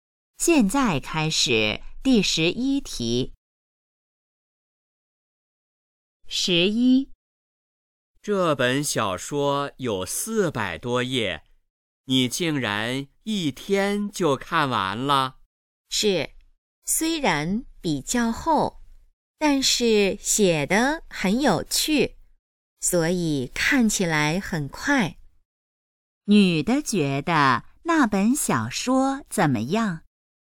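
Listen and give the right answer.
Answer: 很有趣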